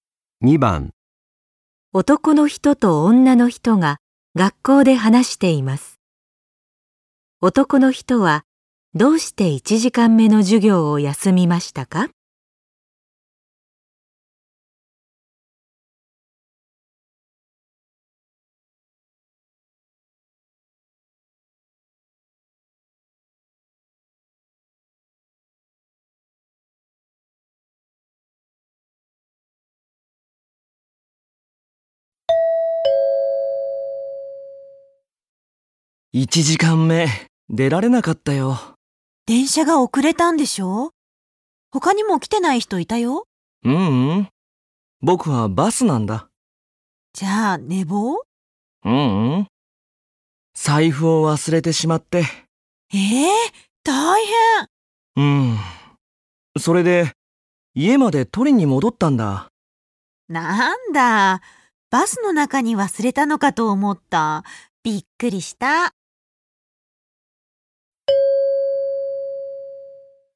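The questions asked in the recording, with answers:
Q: 男の人はどうして1時間目の授業を休みましたか?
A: 財布を忘れて家まで取りに戻ったから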